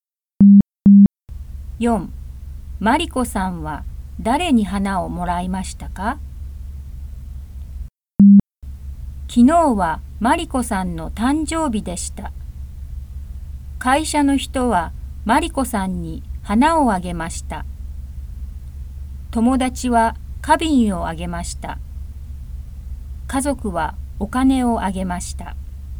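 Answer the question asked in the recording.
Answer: 会社の人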